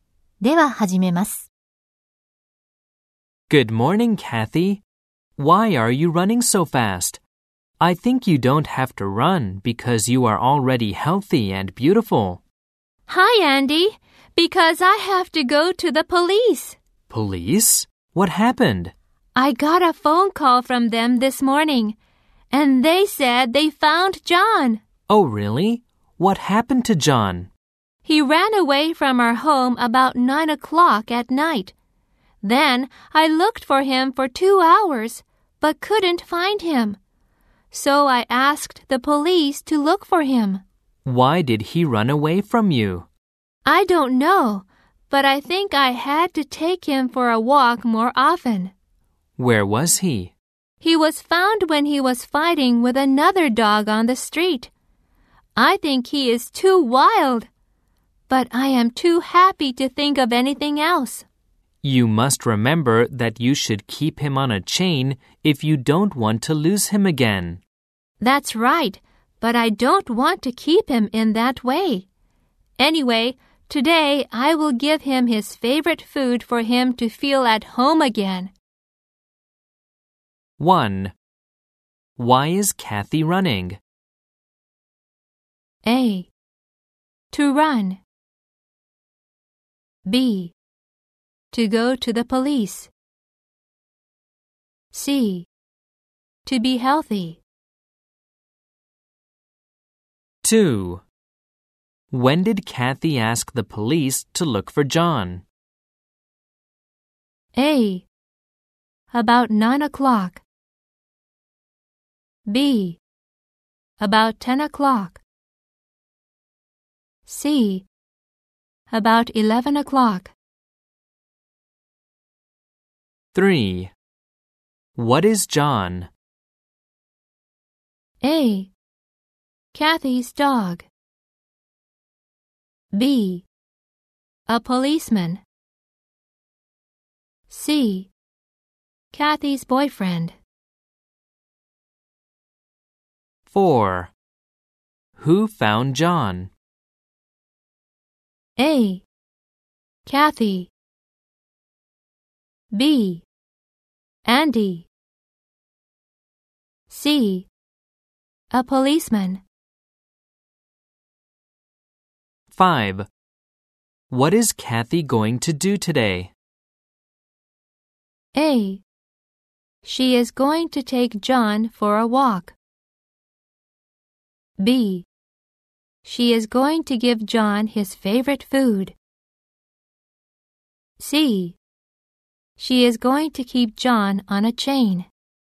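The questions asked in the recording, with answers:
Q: Why is Kathy running?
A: B: To go to the police.

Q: When did Kathy ask the police to look for John?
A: C: About 11 o'clock.

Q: What is John?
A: A: Kathy's dog.

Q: Who found John?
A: C: A policeman.

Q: What is Kathy going to do today?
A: B: She is going to give John his favorite food.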